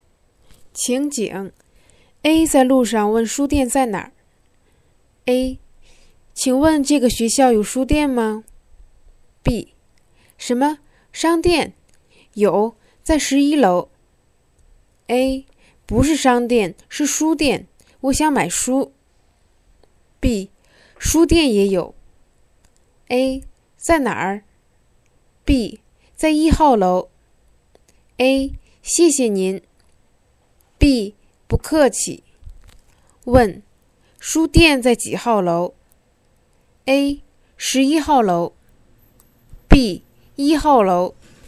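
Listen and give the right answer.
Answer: B: 1号楼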